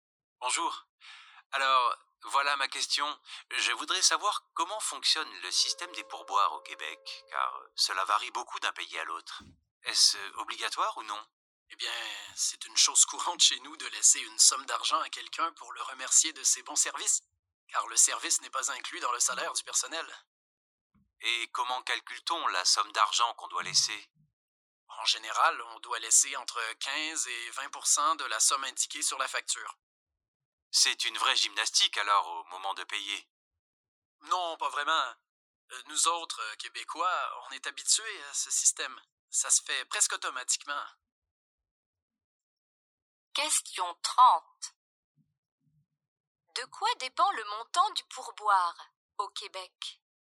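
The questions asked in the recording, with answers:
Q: De quoi dépend le montant du pourboire au Québec?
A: Du montant de la facture (entre 15 et 20 %)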